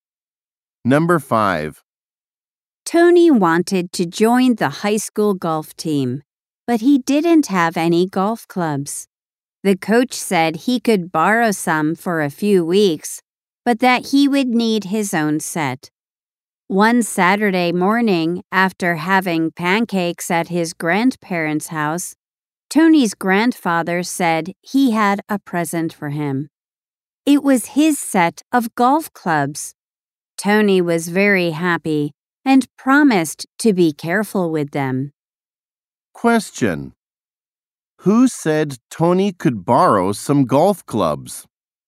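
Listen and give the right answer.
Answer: The coach.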